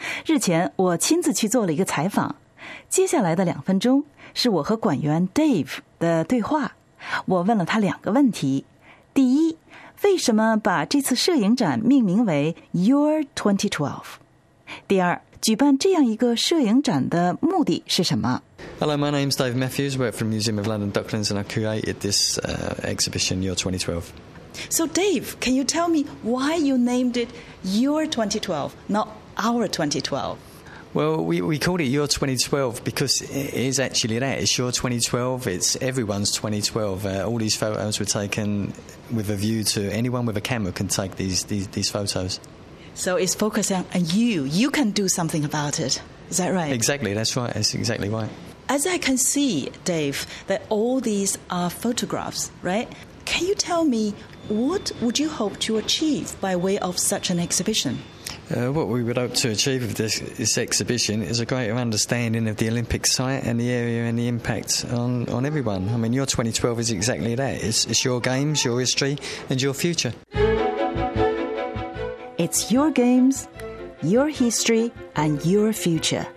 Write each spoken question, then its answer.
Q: 举办这样一个摄影展的目的是什么?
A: 这就是2012摄影展要传递的信息,你的奥运,你的历史,你的未来。